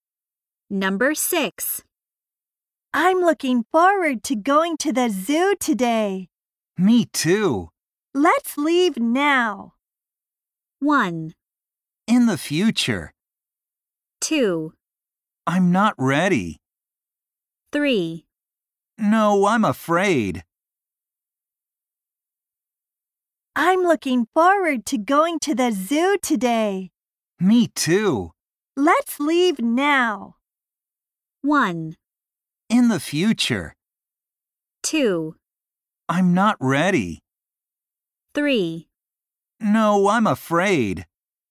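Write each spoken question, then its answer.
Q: Let's leave now.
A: 2: I'm not ready.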